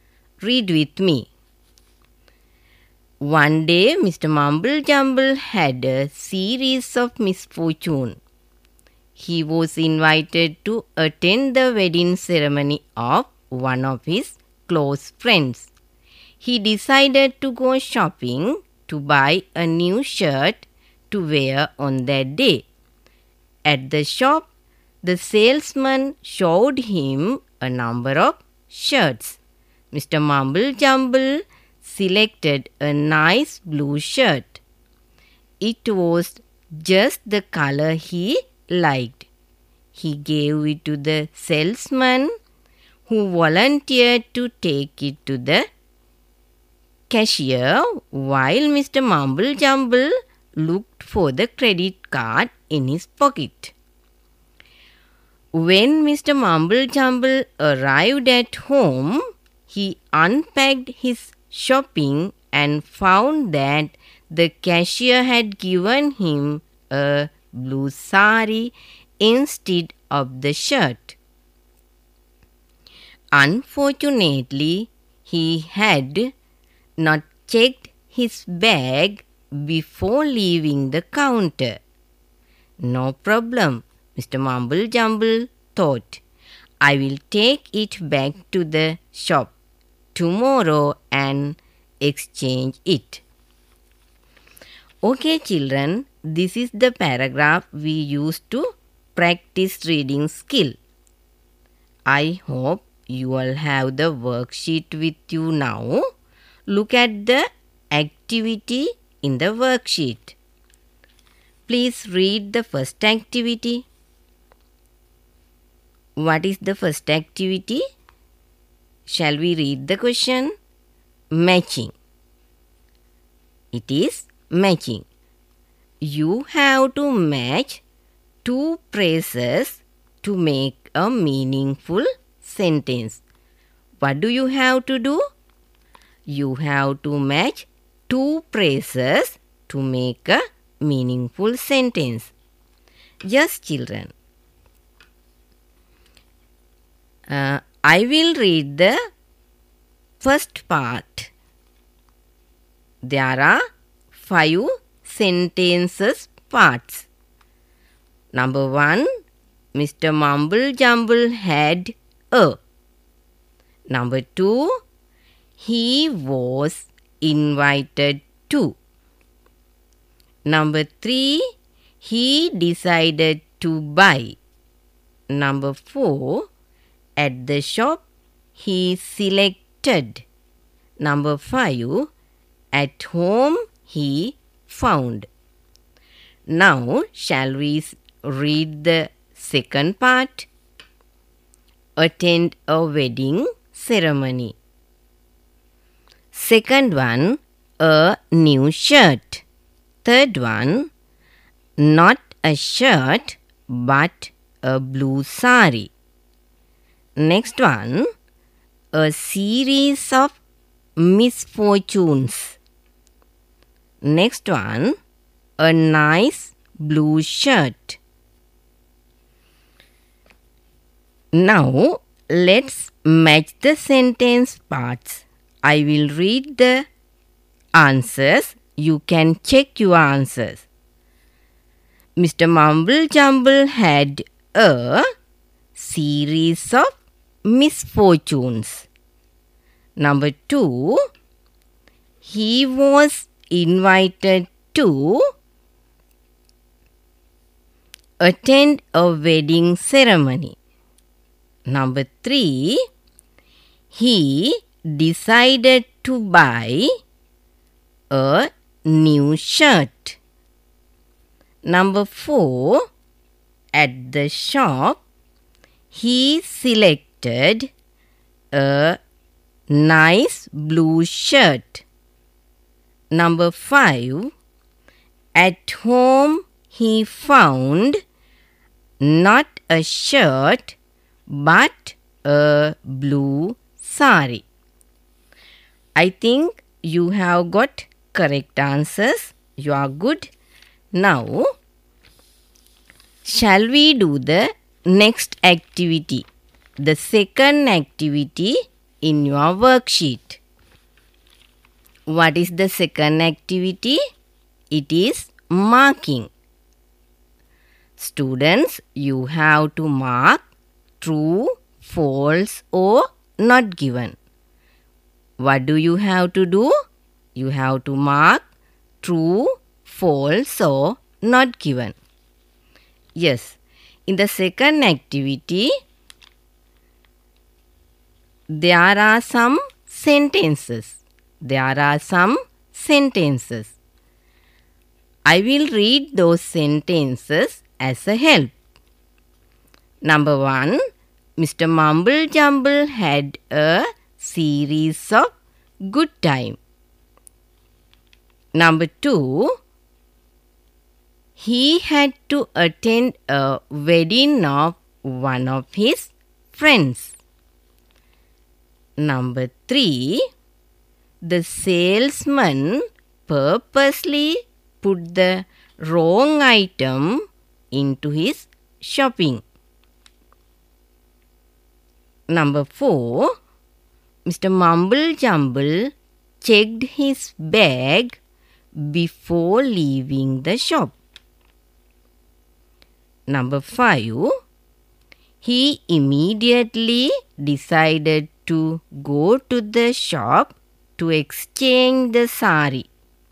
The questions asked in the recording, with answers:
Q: Number one, Mr. Mumble Jumble had a series of good time.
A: That is false.

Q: Number two, he had to attend a wedding of one of his friends.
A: Yes, that is correct. Then you have to mark true.

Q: Number three, the salesman purposely put the wrong item into his shopping.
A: So, we have to mark not given there.

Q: Number four, Mr. Mumble Jumble checked his bag before leaving the shop.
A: Then the answer is false.

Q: Number five, he immediately decided to go to the shop to exchange the sari.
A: Then you have to mark false there.